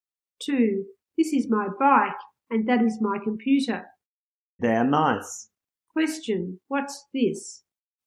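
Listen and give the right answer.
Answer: A bike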